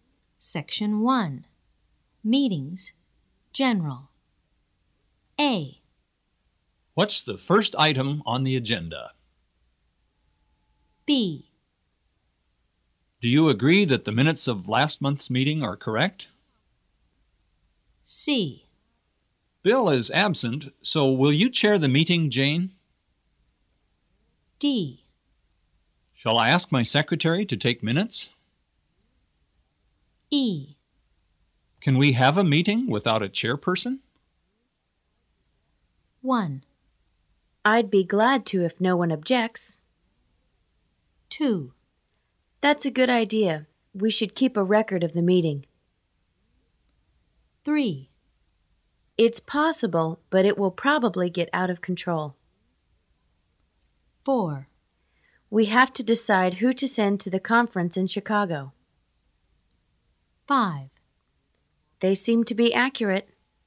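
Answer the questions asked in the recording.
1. 4: We have to decide who to send to the conference in Chicago.
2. 5: They seem to be accurate.
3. 1: I'd be glad to if no one objects.
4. 2: That's a good idea. We should keep a record of the meeting.
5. 3: It's possible, but it will probably get out of control.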